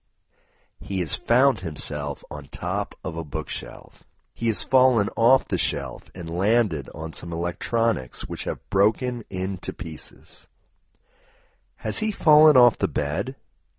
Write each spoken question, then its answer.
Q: Has he fallen off the bed?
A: No, he hasn't fallen off the bed.